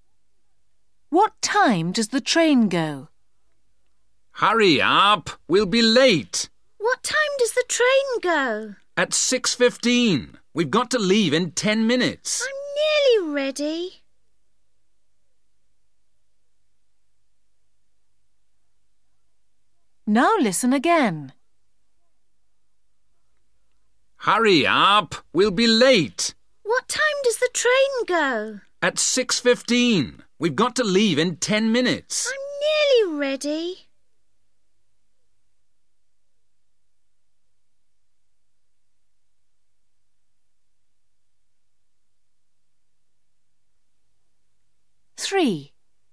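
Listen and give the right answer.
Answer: 6:15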